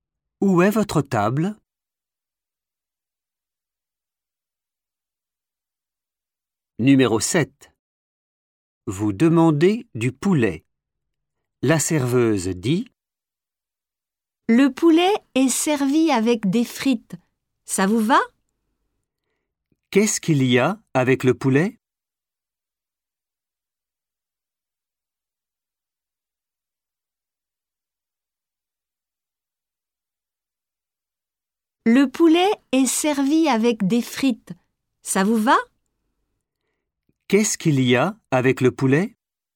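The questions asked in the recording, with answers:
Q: « Qu'est-ce qu'il y a avec le poulet ? »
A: des frites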